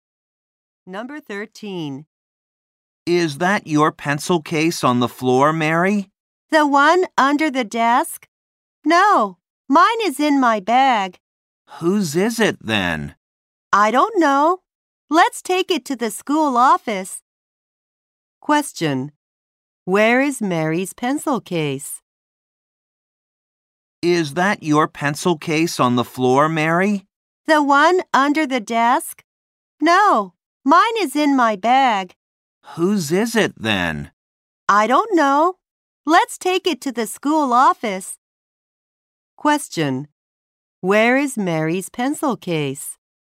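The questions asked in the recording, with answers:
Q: Where is Mary's pencil case?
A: In her bag.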